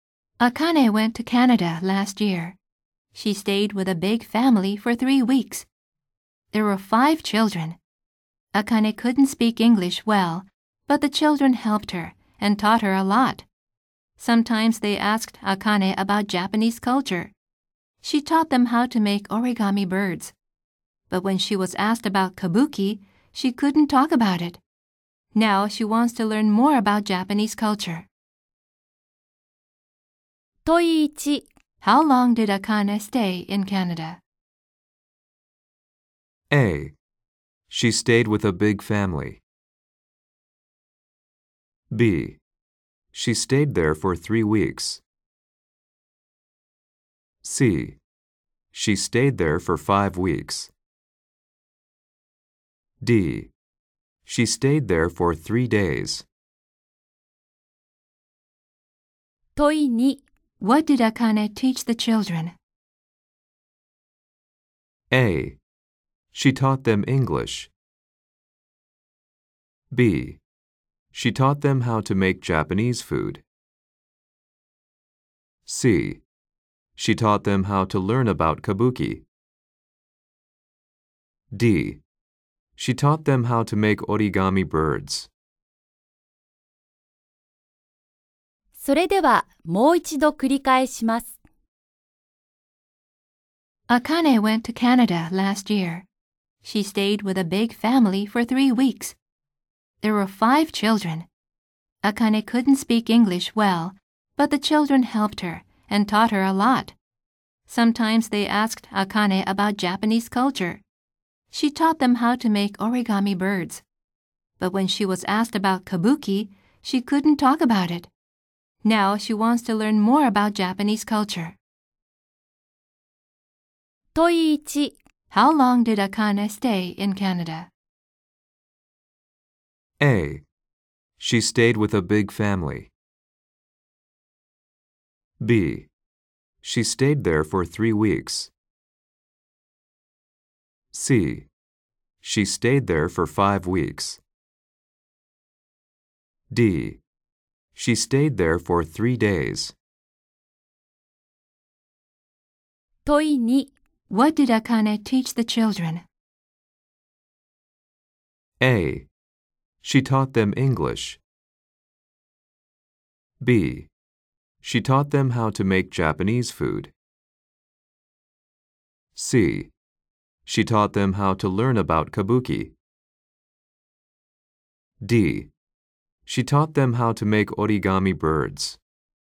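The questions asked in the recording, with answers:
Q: How long did Akane stay in Canada?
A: B: She stayed there for 3 weeks.

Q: What did Akane teach the children?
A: D: She taught them how to make origami birds.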